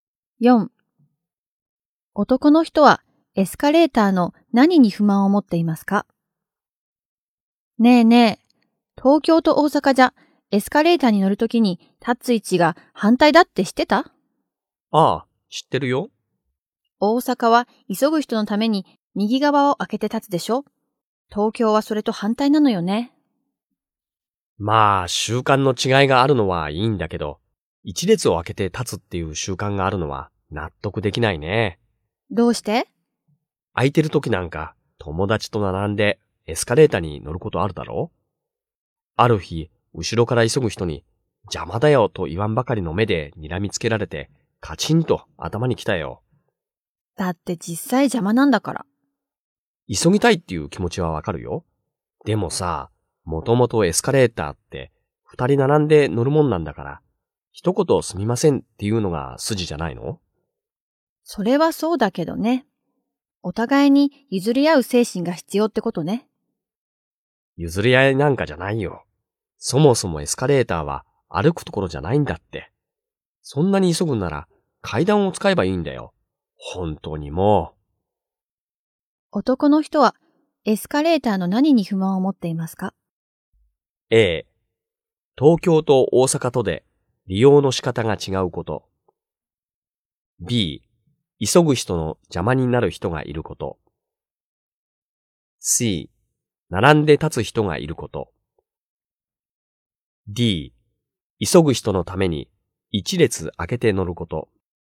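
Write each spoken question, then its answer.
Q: 男の人はエスカレーターの何に不満を持っていますか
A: D: 急ぐ人のために一列開けて乗ること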